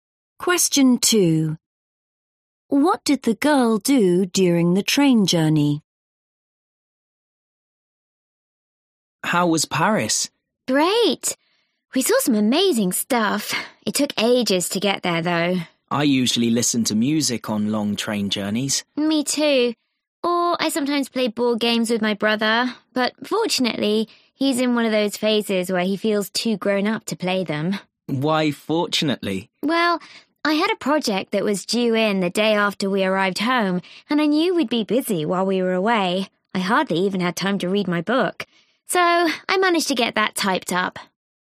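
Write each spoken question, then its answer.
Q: What did the girl do during the train journey?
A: She typed up her project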